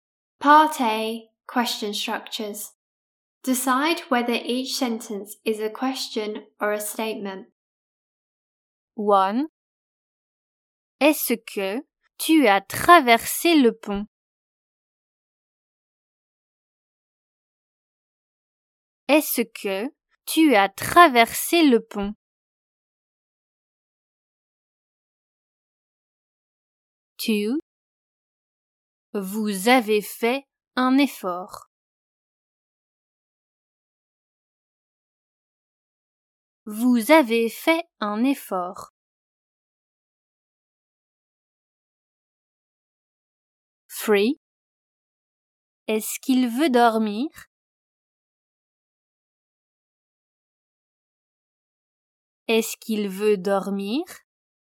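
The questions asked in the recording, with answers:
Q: Est-ce que tu as traversé le pont?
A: question

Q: Vous avez fait un effort.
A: statement

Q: Est-ce qu'il veut dormir?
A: question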